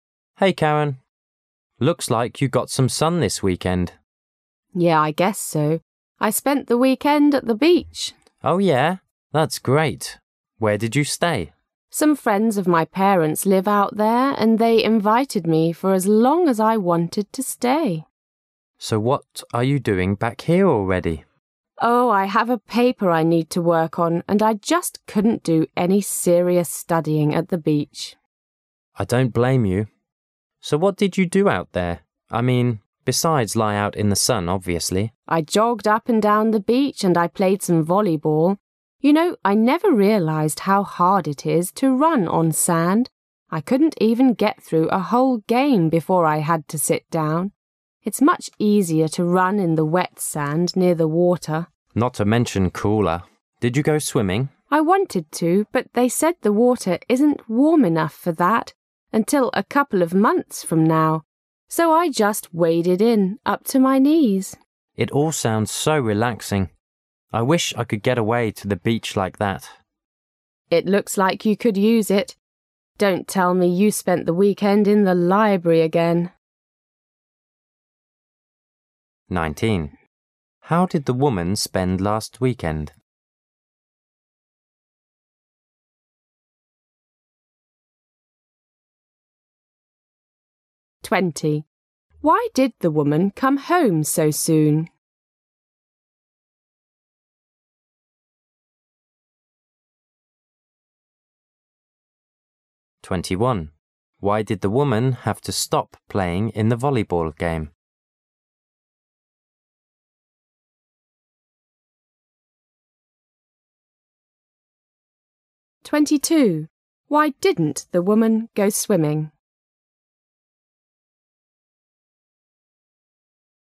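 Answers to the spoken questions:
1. At the beach, staying with friends of her parents
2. She had a paper to work on
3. Running on sand was too hard and tired her out
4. The water wasn't warm enough

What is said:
[解析] 19-22 M: Hey, Karen. Looks like you got some sun this weekend. W: Yeah, I guess so. I spent the weekend at the beach. M: Oh yeah? That's great! Where did you stay? W: Some friends of my parents live out there and they invited me for as long as I wanted to stay. M: So what are you doing back here already? W: Oh, I have a paper I need to work on, and I just couldn't do any serious studying at the beach. M: I don't blame you. So what did you do out there... I mean besides lie out in the sun, obviously? W: I jogged up and down the beach and I played some volleyball. You know, I never realized how hard it is to run on sand. I couldn't even get through a whole game before I had to sit down. 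It's much easier to run in the wet sand near the water. M: Not to mention cooler. Did you go swimming? W: I wanted to, but they said the water isn't warm enough for that until a couple of months from now, so I just waded in up to my knees. M: It all sounds so relaxing. I wish I could get away to the beach like that. It looks like you could use it. Don't tell me you spent the weekend in the library again.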